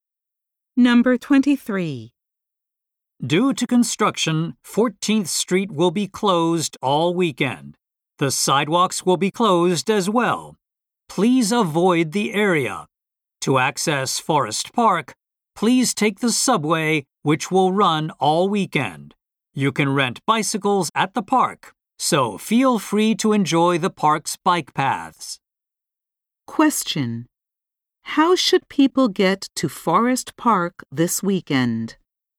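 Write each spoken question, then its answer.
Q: How should people get to Forest Park this weekend?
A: By subway.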